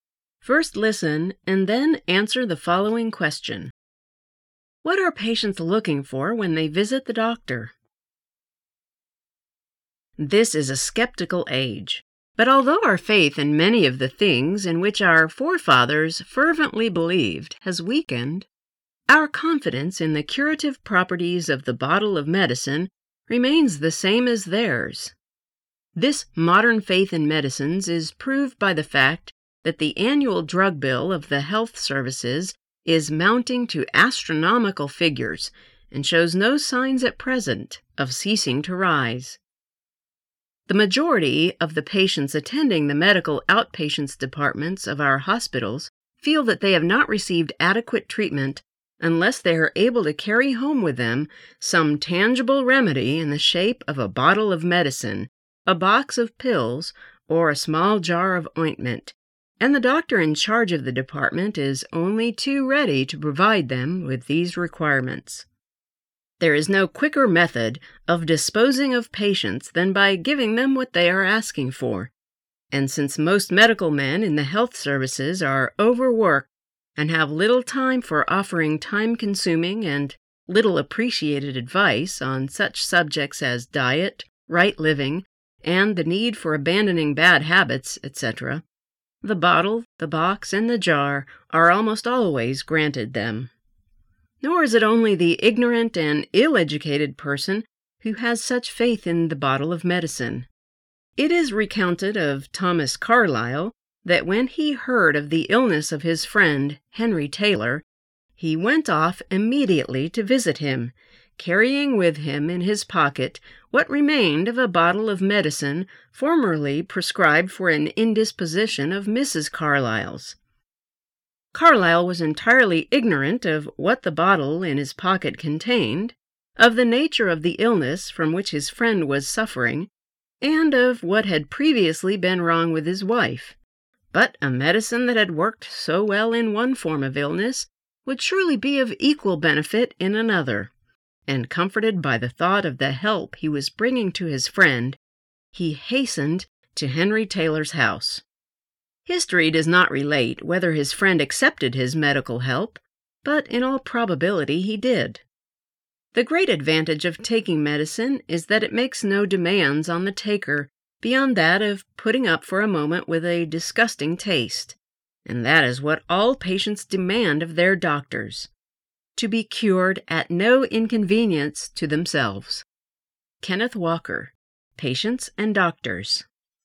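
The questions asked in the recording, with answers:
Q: What are patients looking for when they visit the doctor?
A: A tangible remedy such as medicine, pills or ointment — to be cured at no inconvenience to themselves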